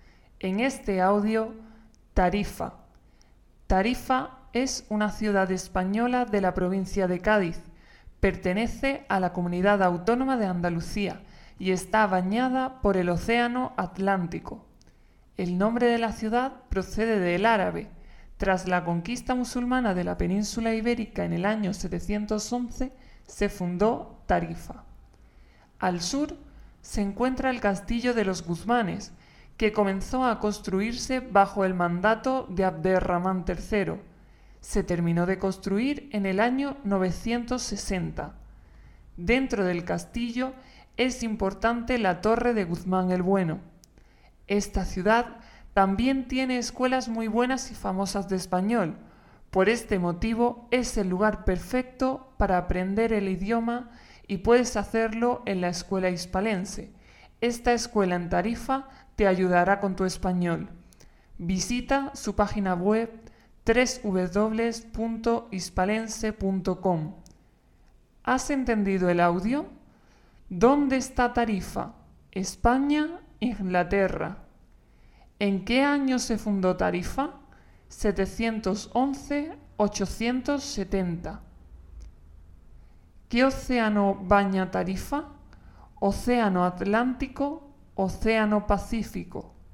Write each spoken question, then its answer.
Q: ¿Dónde está Tarifa?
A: España

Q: ¿En qué año se fundó Tarifa?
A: 711

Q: ¿Qué océano baña Tarifa?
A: Océano Atlántico